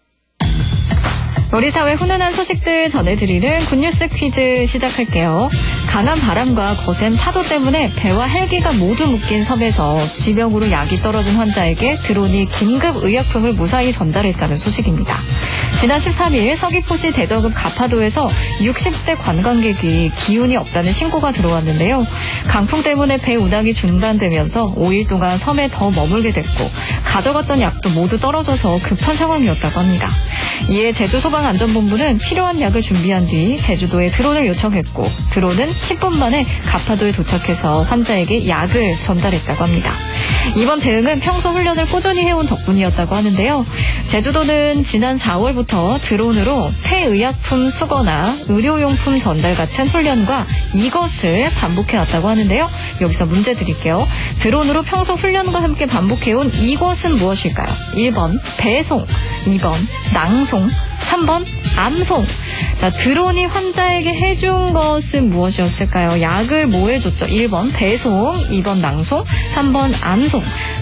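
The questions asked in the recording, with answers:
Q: 드론으로 평소 훈련과 함께 반복해온 이것은 무엇일까요?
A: 1: 배송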